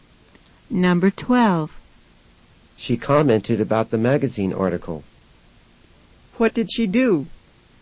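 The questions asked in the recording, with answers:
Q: What did she do?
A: She made a comment about the magazine article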